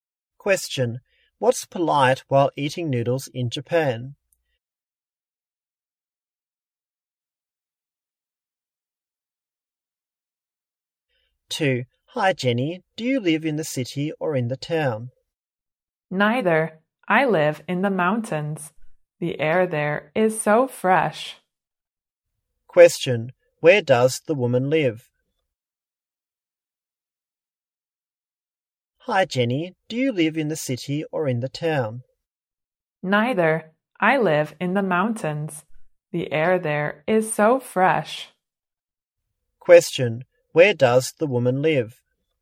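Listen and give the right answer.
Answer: In the mountains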